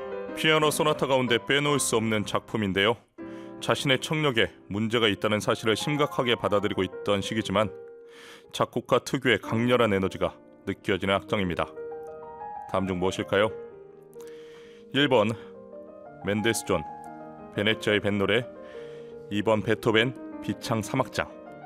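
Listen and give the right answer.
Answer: 2: 베토벤 비창 3악장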